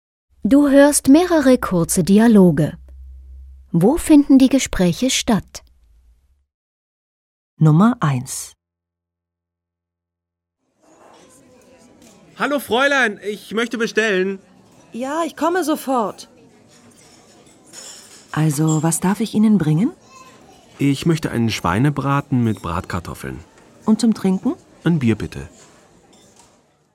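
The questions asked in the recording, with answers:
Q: Wo finden die Gespräche statt?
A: Im Restaurant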